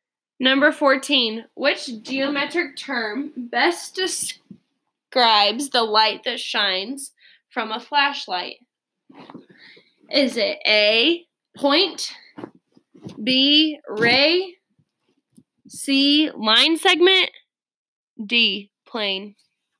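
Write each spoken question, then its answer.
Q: Which geometric term best describes the light that shines from a flashlight?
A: B: ray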